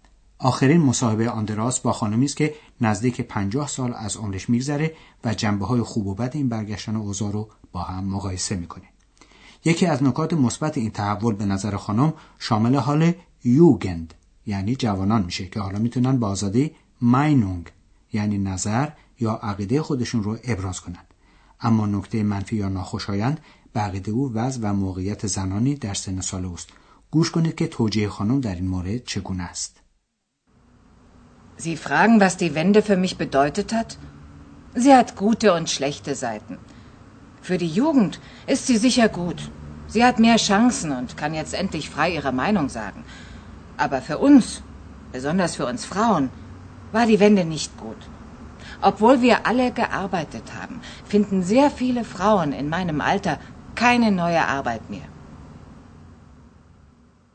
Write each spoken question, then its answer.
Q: گوش کنید که توجیه خانم در این مورد چگونه است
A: امروزه برای اونها و مخصوصا برای خانم های مسن کار جدید پیدا نمیشه.